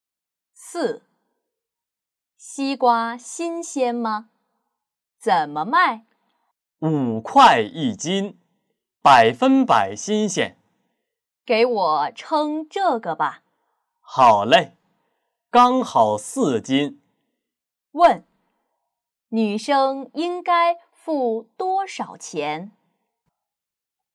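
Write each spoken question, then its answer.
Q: 女生应该付多少钱?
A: 20块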